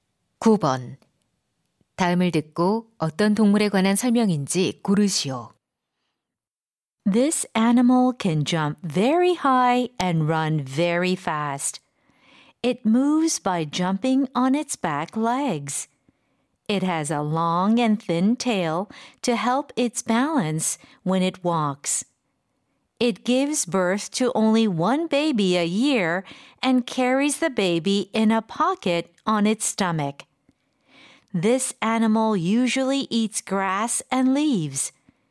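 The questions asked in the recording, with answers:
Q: 다음을 듣고 어떤 동물에 관한 설명인지 고르시오.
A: 캥거루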